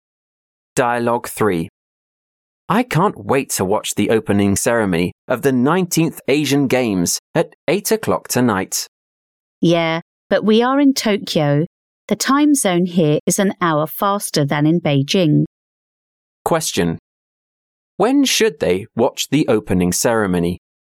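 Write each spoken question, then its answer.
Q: When should they watch the opening ceremony?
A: At 9 o'clock tonight (Tokyo time)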